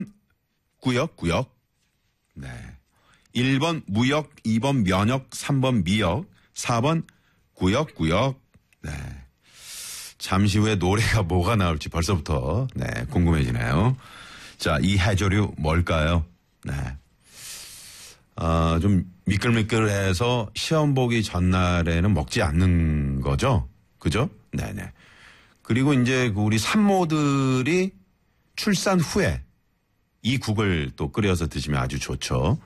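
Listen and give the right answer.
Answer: 3: 미역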